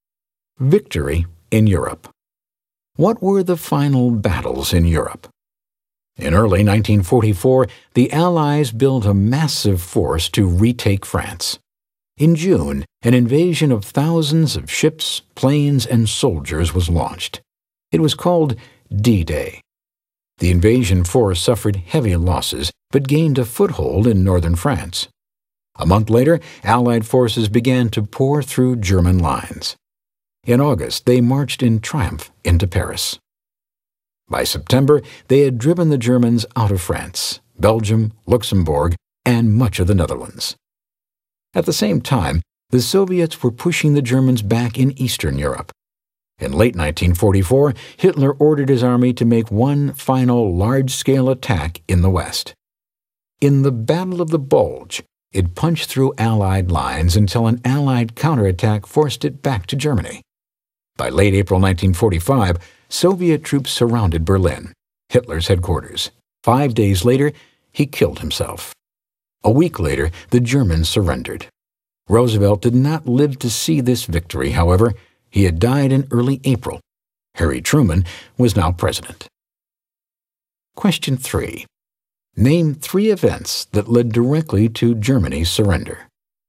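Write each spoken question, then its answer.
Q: Name three events that led directly to Germany's surrender.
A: D-Day invasion and liberation of France, the Battle of the Bulge, Soviet troops surrounding Berlin and Hitler's suicide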